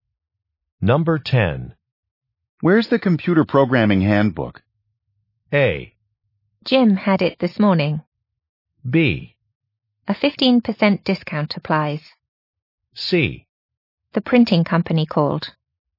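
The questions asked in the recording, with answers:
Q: Where's the computer programming handbook?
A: A: Jim had it this morning.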